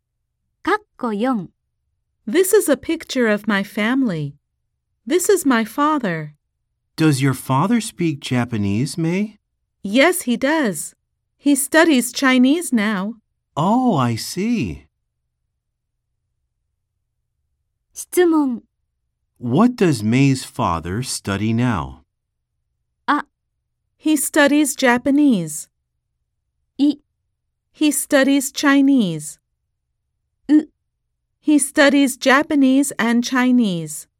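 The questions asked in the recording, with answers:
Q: What does May's father study now?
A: い: He studies Chinese.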